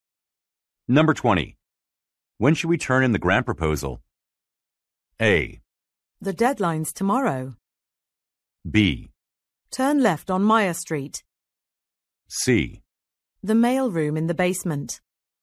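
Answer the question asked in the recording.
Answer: A: The deadline's tomorrow.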